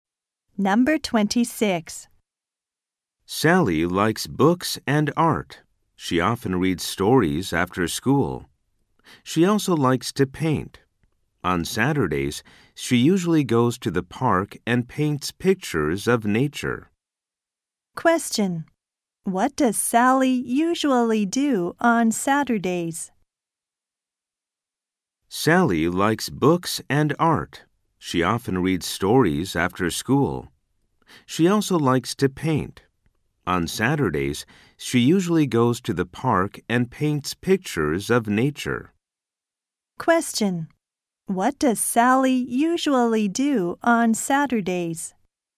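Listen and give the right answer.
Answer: She goes to the park and paints pictures of nature.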